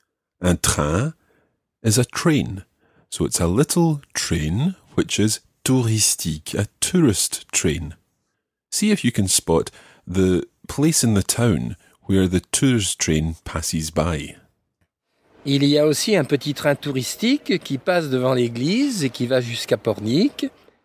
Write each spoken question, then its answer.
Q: See if you can spot the place in the town where the tourist train passes by.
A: So it passes devant l'église, in front of the church.